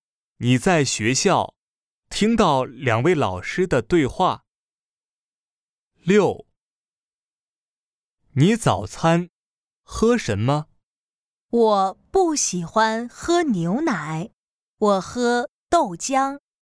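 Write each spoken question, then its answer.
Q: 你早餐喝什么?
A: 豆浆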